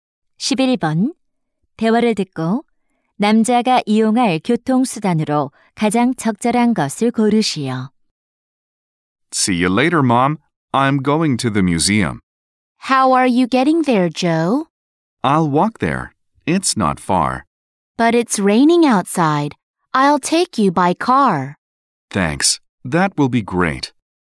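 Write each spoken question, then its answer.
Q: 대화를 듣고 남자가 이용할 교통수단으로 가장 적절한 것을 고르시오.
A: 자동차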